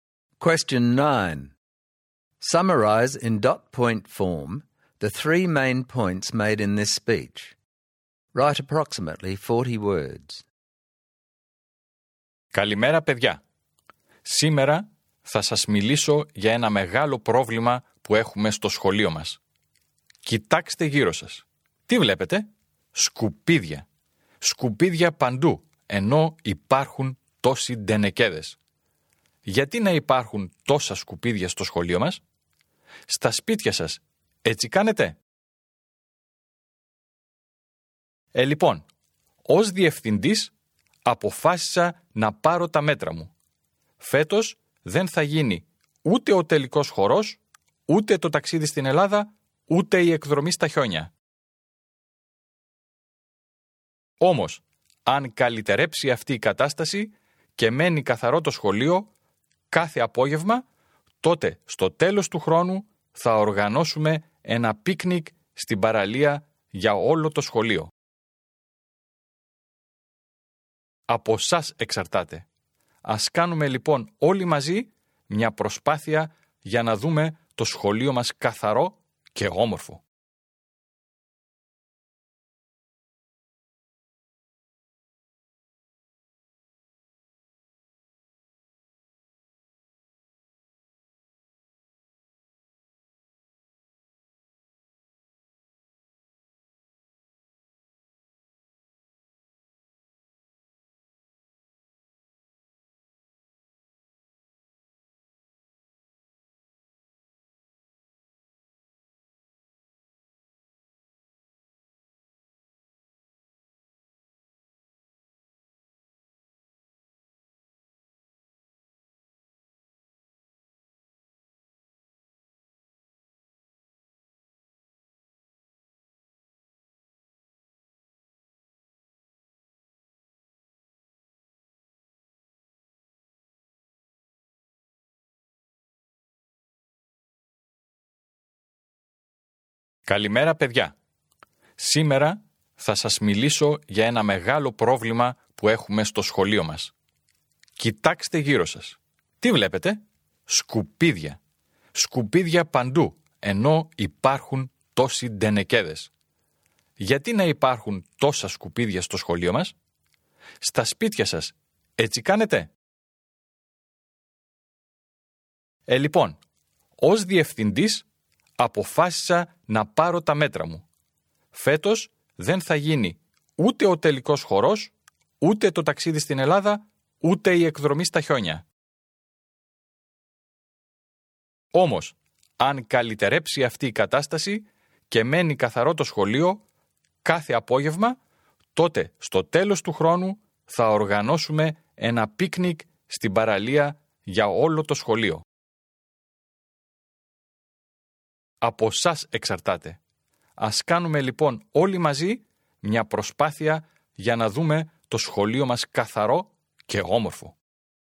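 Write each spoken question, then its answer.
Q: Summarize in dot point form the three main points made in this speech.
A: There is rubbish everywhere at school even though there are bins; this year's formal, Greece trip and snow trip are cancelled; if the school is kept clean there will be a beach picnic at the end of the year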